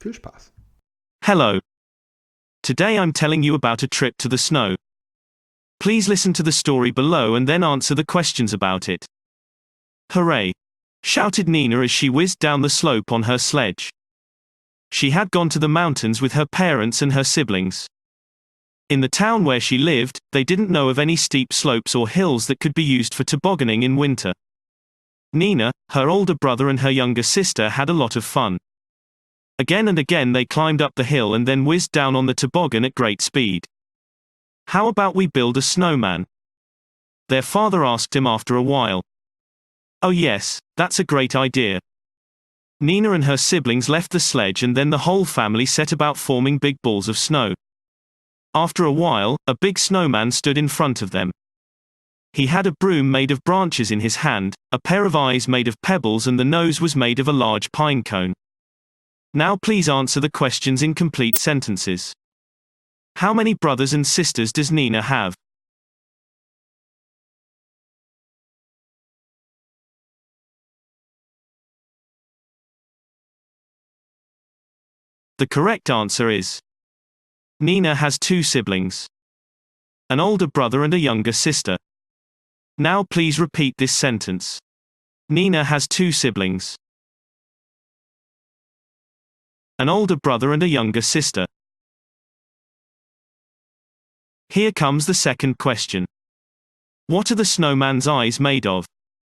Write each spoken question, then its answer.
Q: How many brothers and sisters does Nina have?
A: The correct answer is Nina has two siblings, an older brother and a younger sister.

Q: What are the snowman's eyes made of?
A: The correct answer is the snowman's eyes are made of pebbles.